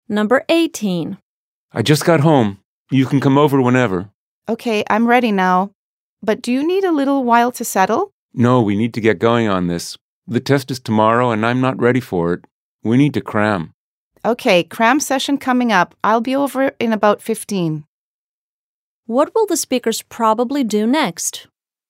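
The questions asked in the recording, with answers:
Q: What will the speakers probably do next?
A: Meet at the first speaker's home to cram for tomorrow's test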